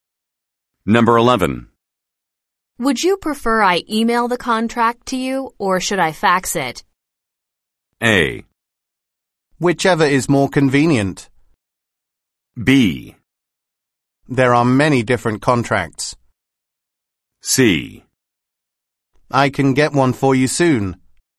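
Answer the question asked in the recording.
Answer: A: Whichever is more convenient.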